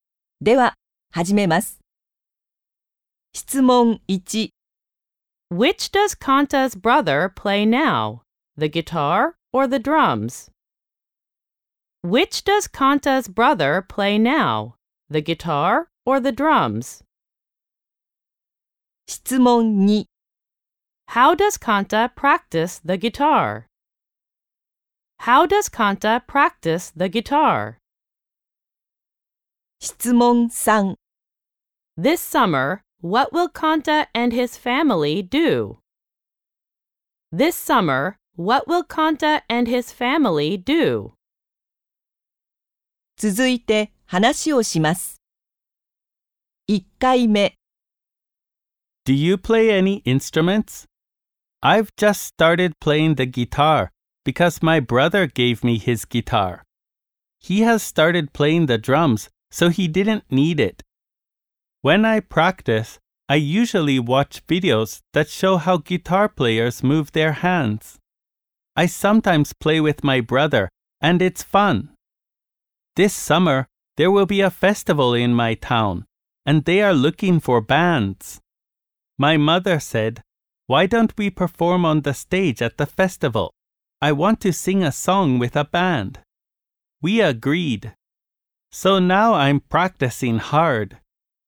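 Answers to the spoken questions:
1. The drums
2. He watches videos that show how guitar players move their hands
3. Perform on the stage at the town festival as a band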